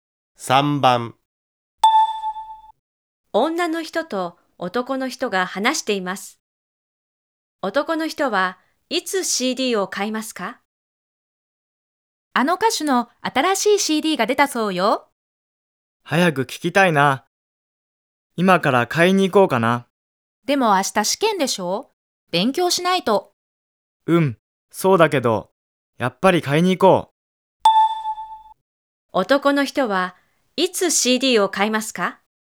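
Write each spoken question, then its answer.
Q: 男の人はいつ CD を買いますか?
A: 今から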